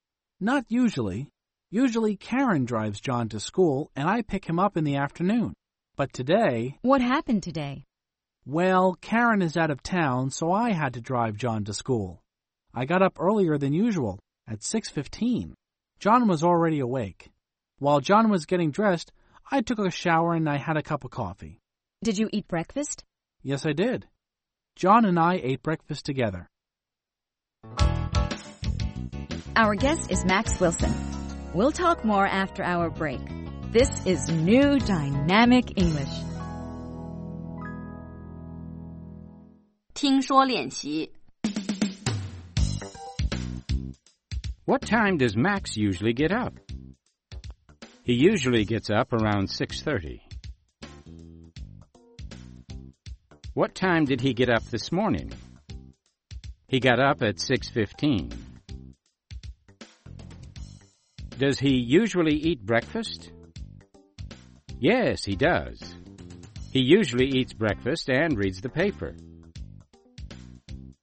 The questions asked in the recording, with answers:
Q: What time does Max usually get up?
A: He usually gets up around 6:30.